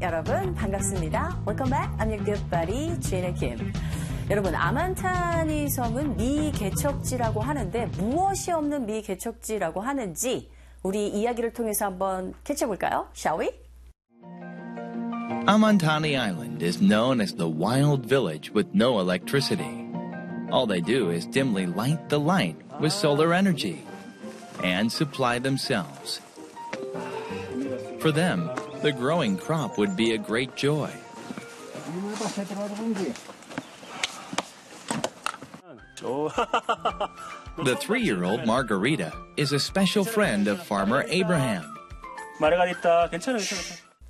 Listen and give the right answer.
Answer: 전기가 없는 곳이라고 하죠?